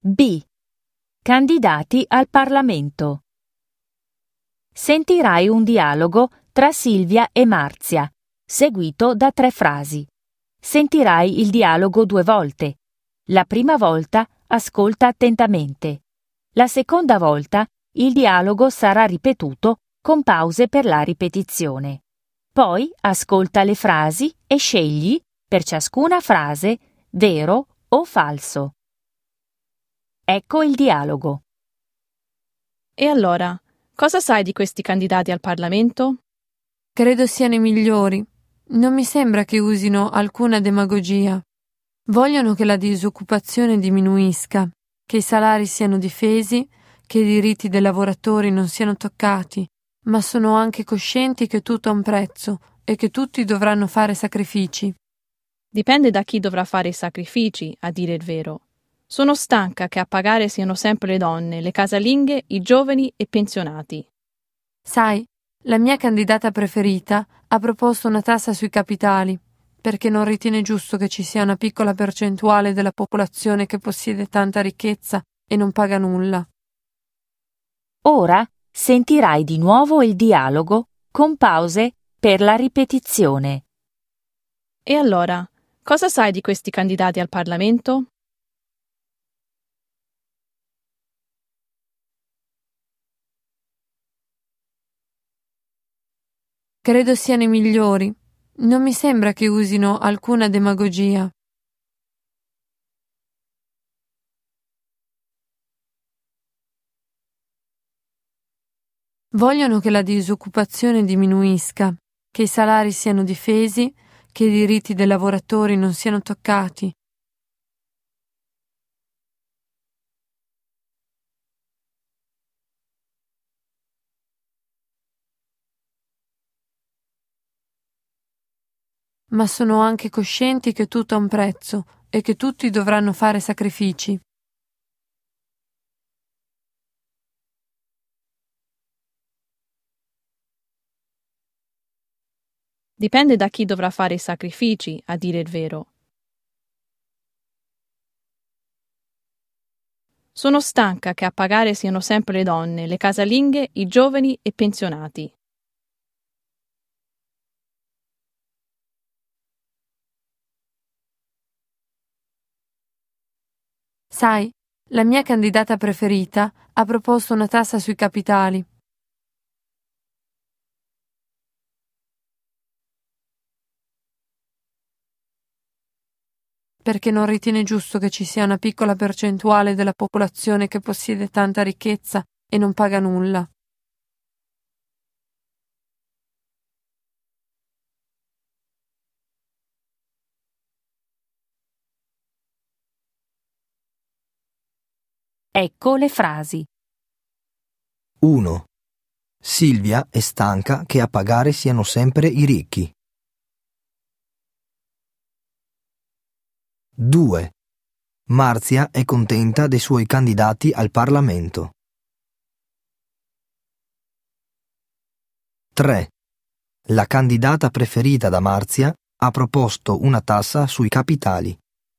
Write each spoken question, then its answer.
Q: Silvia è stanca che a pagare siano sempre i ricchi.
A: 1. Falso.

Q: Marzia è contenta dei suoi candidati al Parlamento.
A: 2. Vero.

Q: La candidata preferita da Marzia ha proposto una tassa sui capitali.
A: 3. Vero.